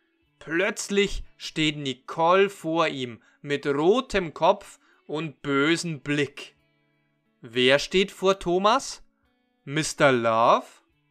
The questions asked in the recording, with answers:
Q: Wer steht vor Thomas? Mr.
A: Nein, Mr. Love steht nicht vor Thomas, sondern Nicole.